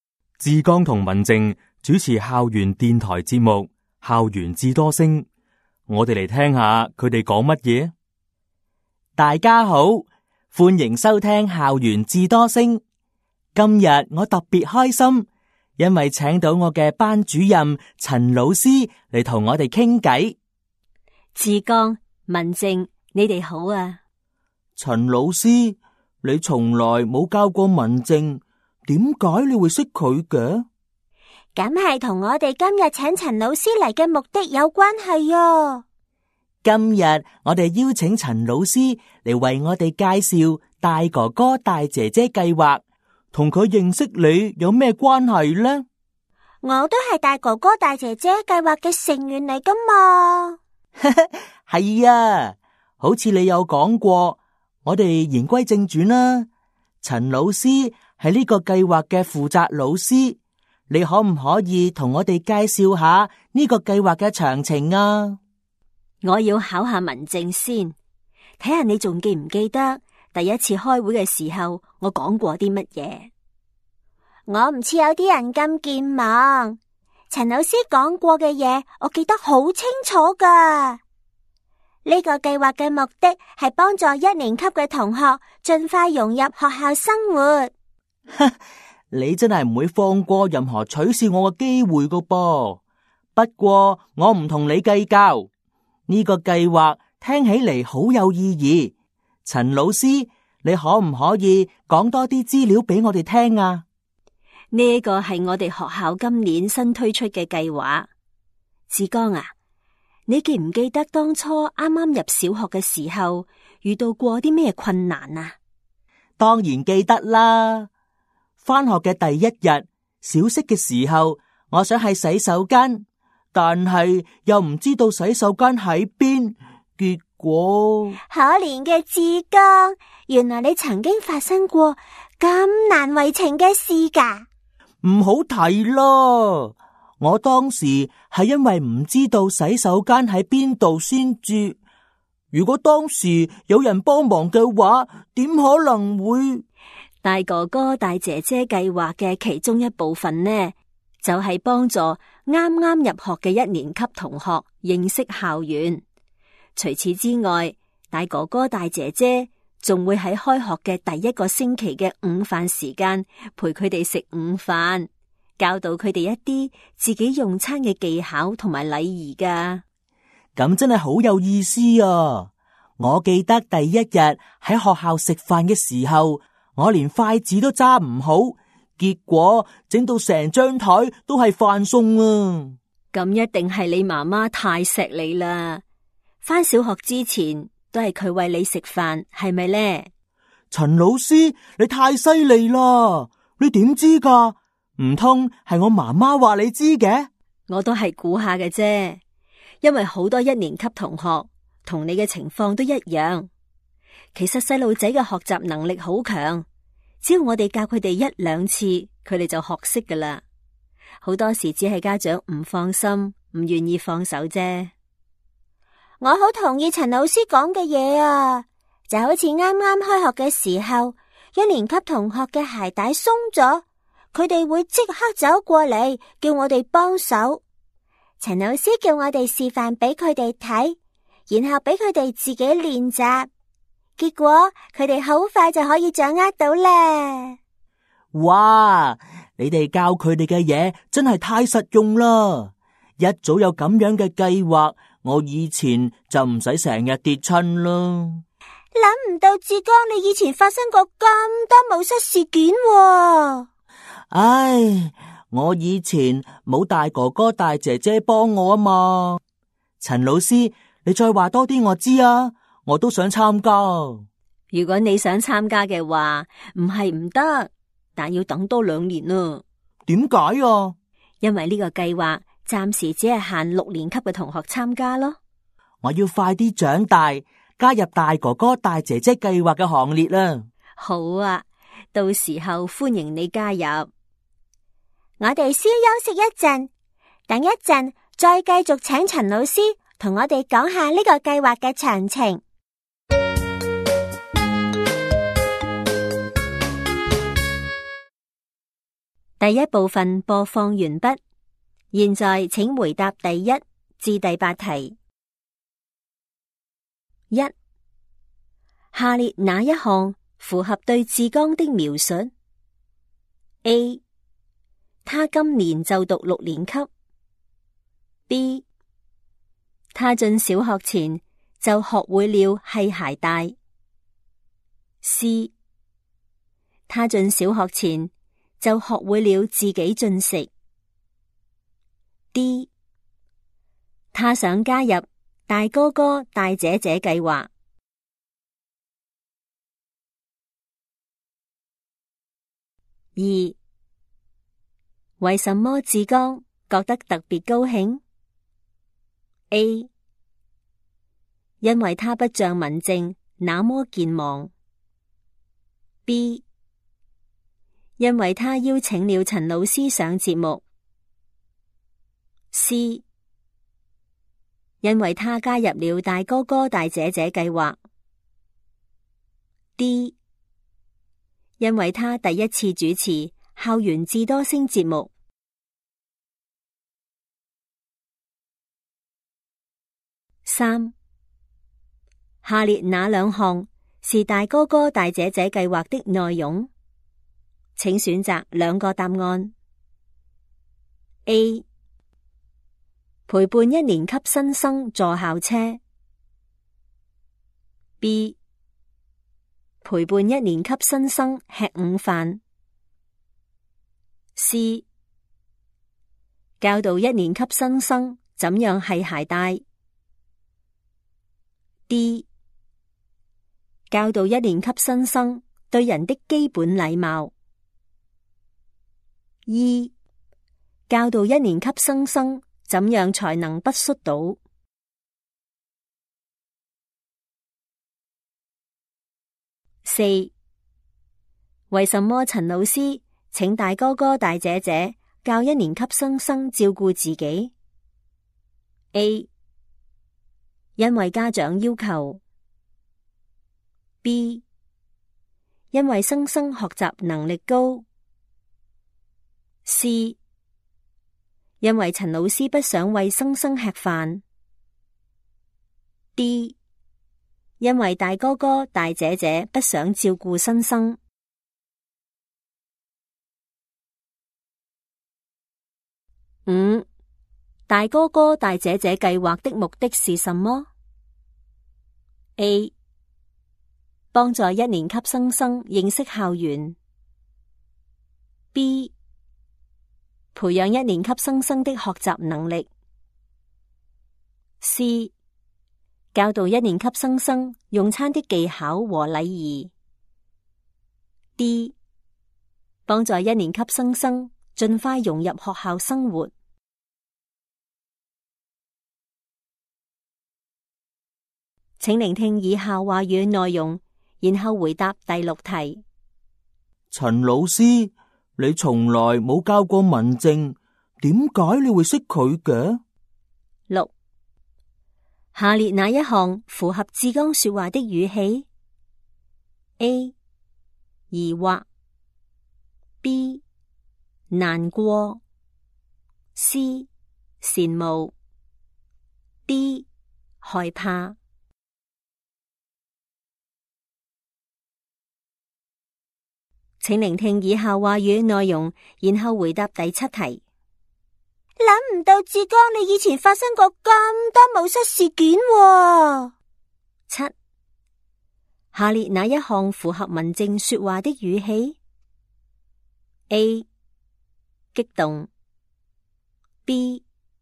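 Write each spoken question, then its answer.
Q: 下列哪一项符合对志刚的描述 ?A, 他今年就读六年级。 B, 他进小学前就学会了系鞋带。C, 他进小学前就学会了自己进食。 D, 他想加入大哥哥大姐姐计划。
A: D: 他想加入大哥哥大姐姐计划

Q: 为什么志刚觉得特别高兴 ?A, 因为他不像文静那么健忘。 B,因为他邀请了陈老师上节目。C, 因为他加入了大哥哥大姐姐计划。 D, 因为他第一次主持校园智多星节目。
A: B: 因为他邀请了陈老师上节目

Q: 下列哪两项是大哥哥大姐姐计划的内容?请选择两个答案。 A, 陪伴一年级新生坐校车。B, 陪伴一年级新生吃午饭。 C, 教导一年级新生怎样系鞋带。D, 教导一年级新生对人的基本礼貌。 二,教导一年级新生怎样才能不摔倒。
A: B: 陪伴一年级新生吃午饭; C: 教导一年级新生怎样系鞋带

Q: 为什么陈老师请大哥哥大姐姐教一年级新生照顾自己 ?A, 因为家长要求。 B, 因为新生学习能力高。C, 因为陈老师不想为生生吃饭。 D, 因为大哥哥大姐姐不想照顾生生。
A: B: 因为新生学习能力高

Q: 大哥哥大姐姐计划的目的是什么? A, 帮助一年级生生认识校园。 B,培养一年级生生的学习能力。C, 教导一年级生生用餐的技巧和礼仪。 D, 帮助一年级生生尽快融入学校生活。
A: D: 帮助一年级生生尽快融入学校生活

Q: 下列哪一项符合志刚说话的语气 ?A, 疑惑。B, 难过。 C, 羡慕。D, 害怕。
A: A: 疑惑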